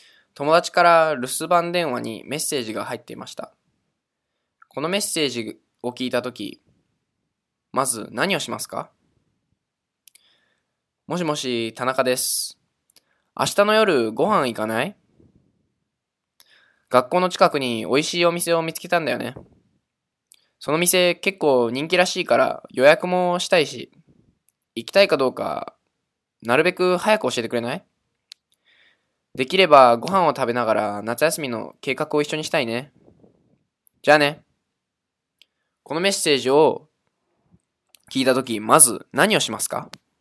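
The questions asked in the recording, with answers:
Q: このメッセージを聞いたとき、まず何をしますか?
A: 田中さんに、明日の夜ご飯に行くかどうか早く連絡する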